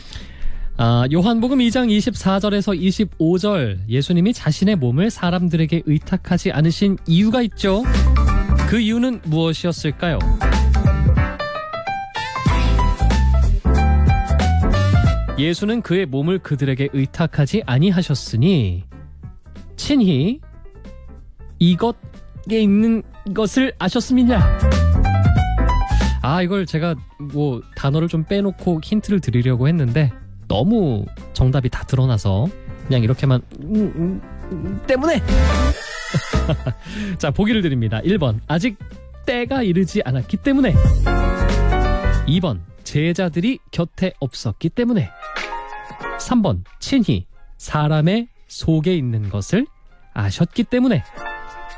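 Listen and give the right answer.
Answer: 3: 친히 사람의 속에 있는 것을 아셨기 때문에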